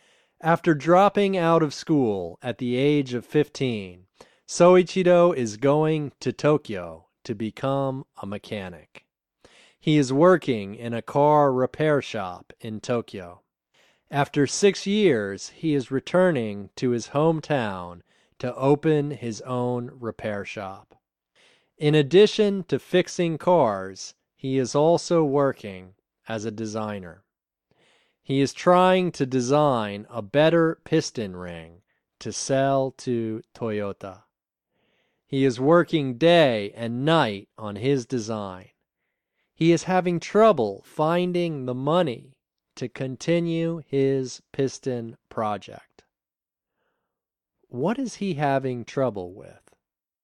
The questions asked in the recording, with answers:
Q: What is he having trouble with?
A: He is having trouble finding the money to continue his piston project.